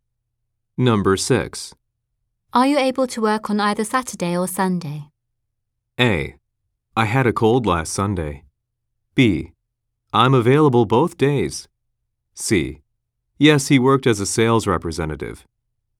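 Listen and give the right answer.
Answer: B: I'm available both days.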